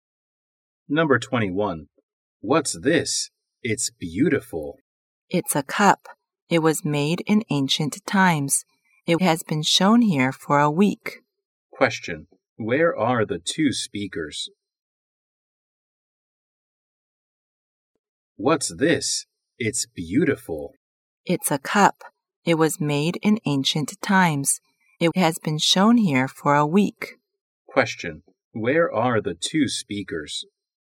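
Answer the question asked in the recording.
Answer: In a museum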